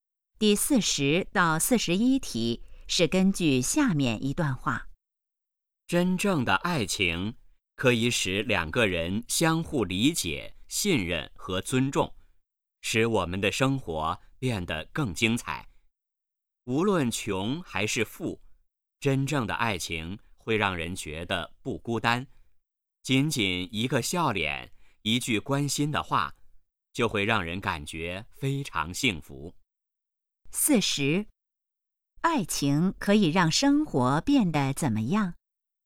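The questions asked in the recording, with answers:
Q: 爱情可以让生活变得怎么样?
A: 更精彩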